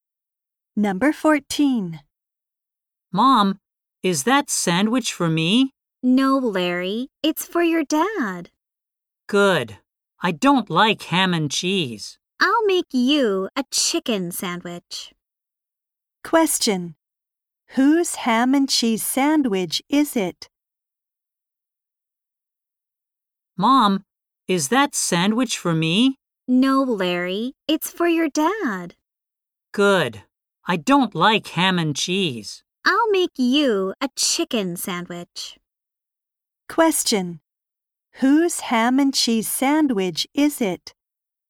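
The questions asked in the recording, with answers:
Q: Whose ham and cheese sandwich is it?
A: Larry's dad's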